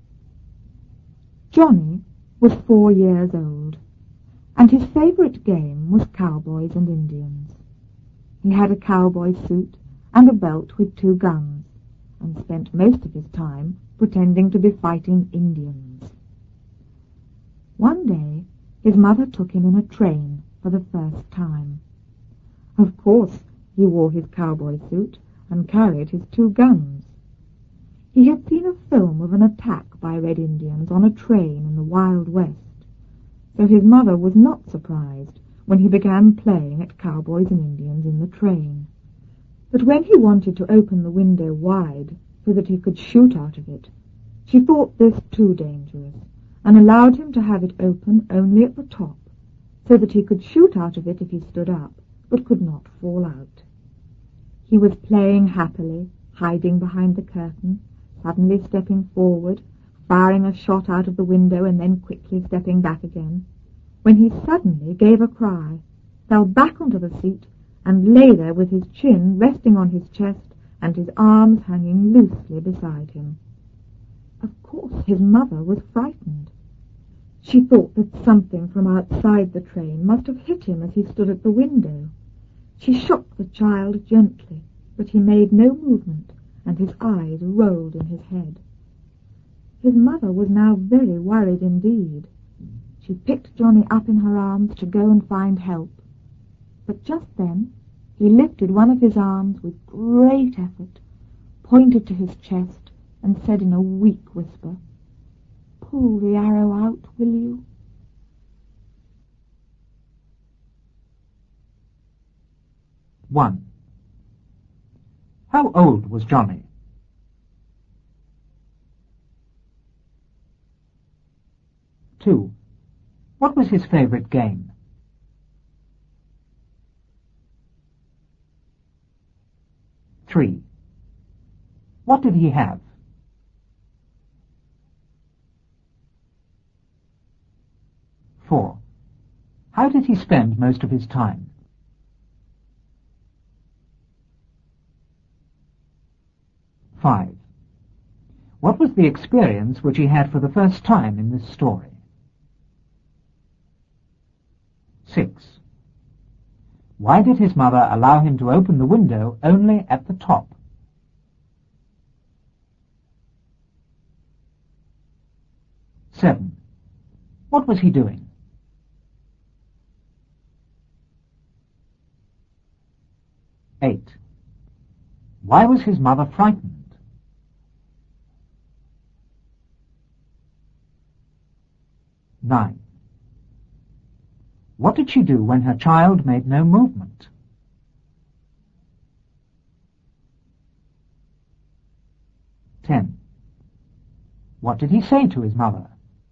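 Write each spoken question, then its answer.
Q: How old was Johnny?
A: 4 years old

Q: What was his favourite game?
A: cowboys and Indians

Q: What did he have?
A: a cowboy suit and a belt with two guns

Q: How did he spend most of his time?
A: pretending to be fighting Indians

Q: What was the experience which he had for the first time in this story?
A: travelling on a train

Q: Why did his mother allow him to open the window only at the top?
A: opening it wide was too dangerous; he could shoot out but not fall out

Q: What was he doing?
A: playing cowboys and Indians, hiding behind the curtain and firing out of the window

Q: Why was his mother frightened?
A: he cried, fell back and lay still; she thought something from outside had hit him

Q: What did she do when her child made no movement?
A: she picked him up to go and find help

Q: What did he say to his mother?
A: Pull the arrow out, will you?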